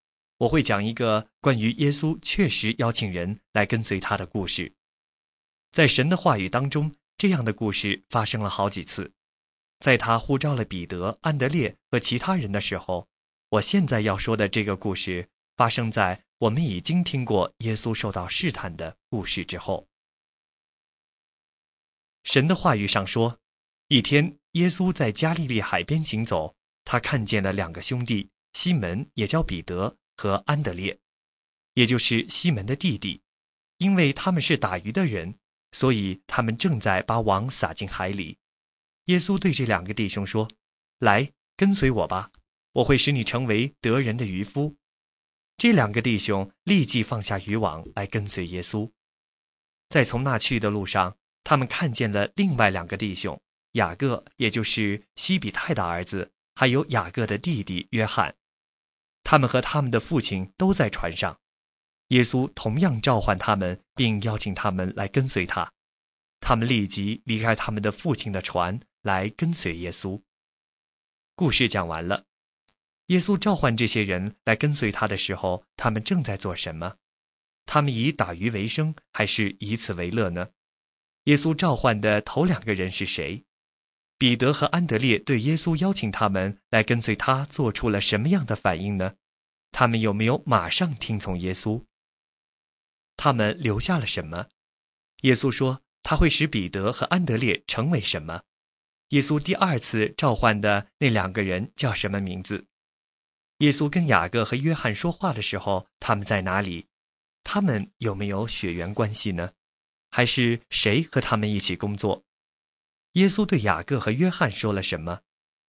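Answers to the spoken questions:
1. 打鱼(把网撒进海里)
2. 西门彼得和安德烈
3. 有,立即放下渔网跟随
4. 渔网
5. 得人的渔夫
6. 雅各和约翰
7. 在船上
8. 有,他们是兄弟
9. 他们的父亲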